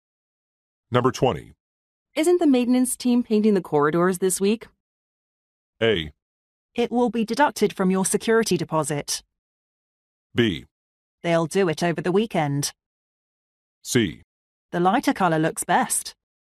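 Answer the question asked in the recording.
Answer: B: They'll do it over the weekend.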